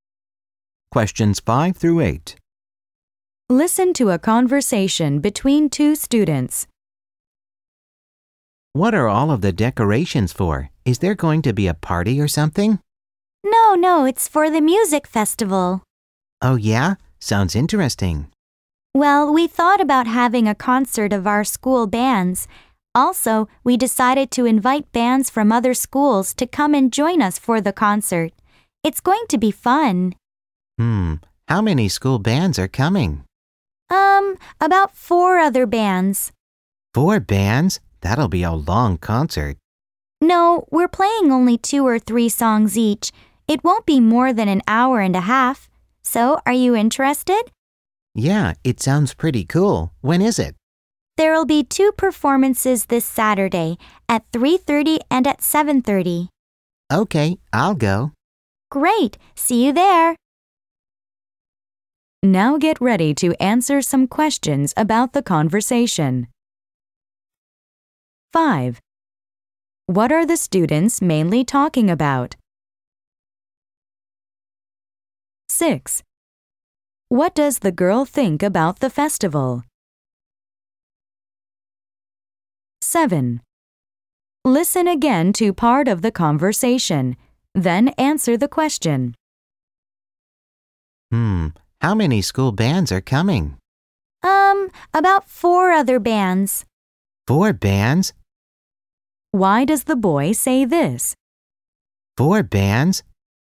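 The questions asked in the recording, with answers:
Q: What are the students mainly talking about?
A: A music festival (a concert of school bands)

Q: Why does the boy say this?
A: He thinks the concert will be very long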